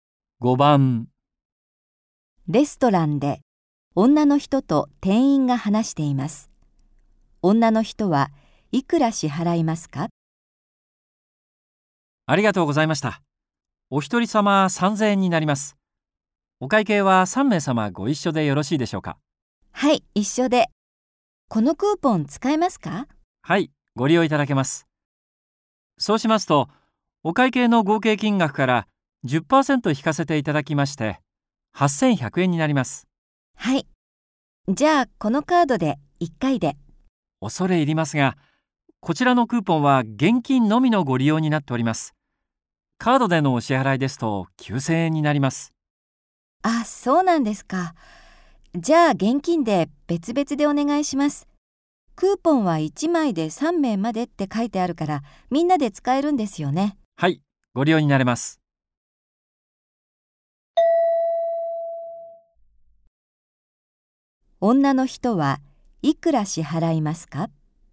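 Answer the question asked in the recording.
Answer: 2700円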